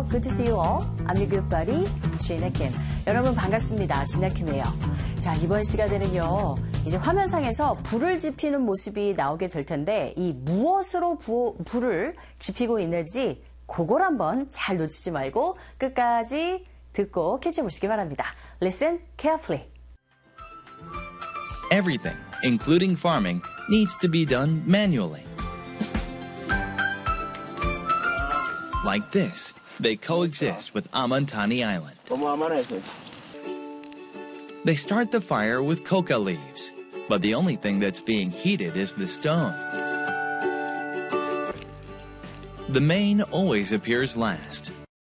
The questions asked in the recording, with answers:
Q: 이 무엇으로 불을 지피고 있는지, 그걸 한번 잘 놓치지 말고 끝까지 듣고 캐치해 보시기 바랍니다.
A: 네, 불을 지피는데 코카 잎들로 지금 불을 지피기 시작을 합니다.